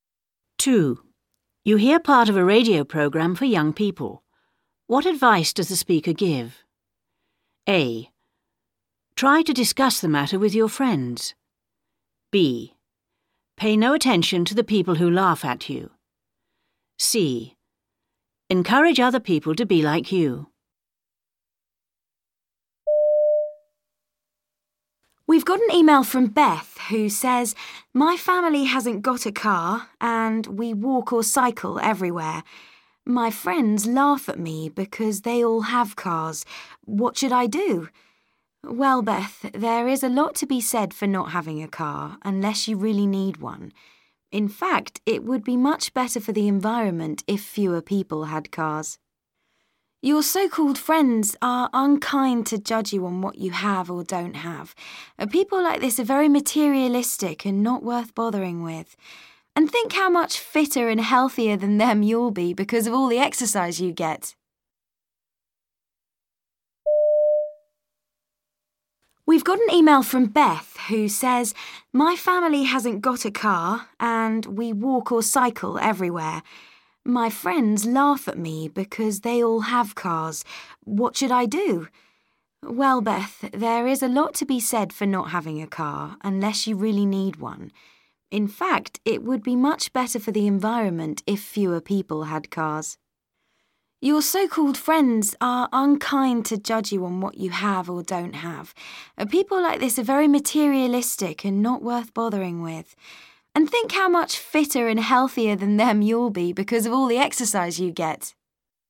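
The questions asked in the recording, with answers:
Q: What advice does the speaker give?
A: B: Pay no attention to the people who laugh at you.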